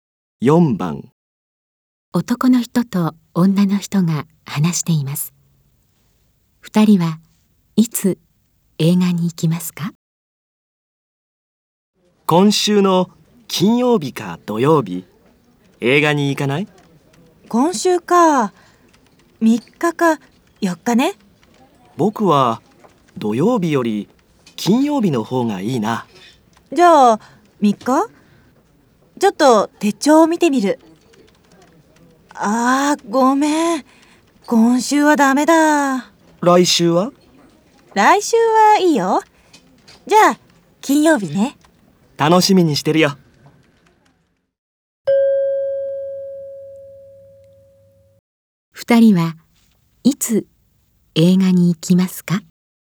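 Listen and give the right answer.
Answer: 来週の金曜日(10日)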